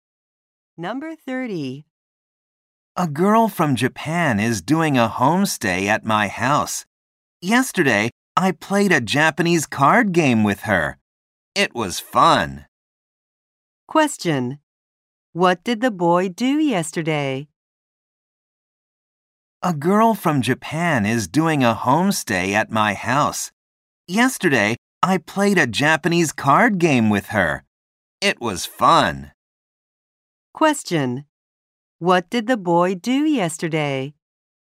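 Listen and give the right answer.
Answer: He played a Japanese card game.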